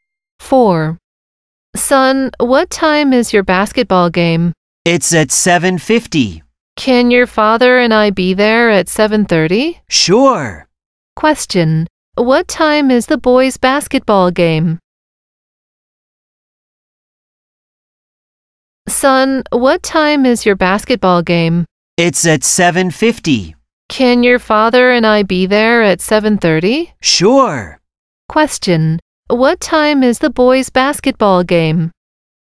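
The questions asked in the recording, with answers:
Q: What time is the boys' basketball game?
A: At 7:50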